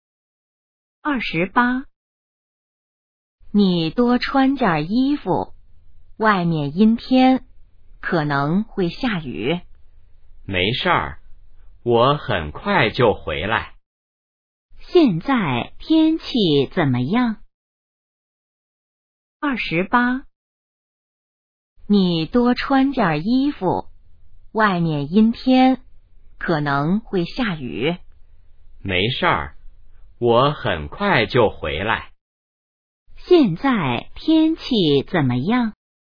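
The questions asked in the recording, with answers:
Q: 现在天气怎么样?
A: 阴天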